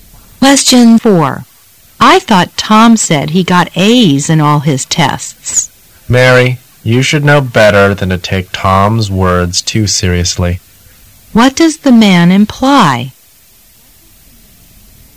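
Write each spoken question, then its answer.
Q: What does the man imply?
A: Tom's words can't be trusted.

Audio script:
[解析] W: I thought Tom said he got A's in all his tests. M: Mary, you should know better than to take Tom's words too seriously. Q: What does the man imply?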